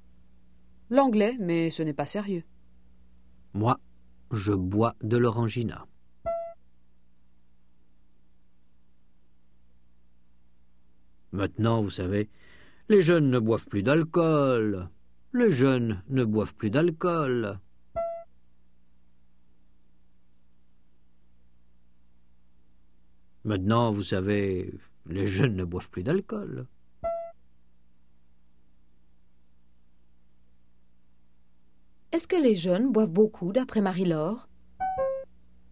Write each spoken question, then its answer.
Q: Est-ce que les jeunes boivent beaucoup, d'après Marie-Laure?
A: Non, ils ne boivent plus d'alcool.